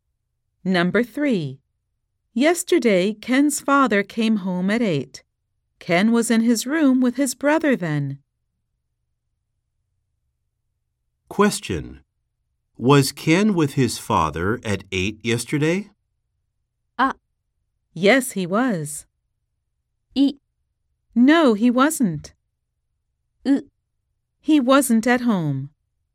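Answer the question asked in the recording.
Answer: B: No, he wasn't.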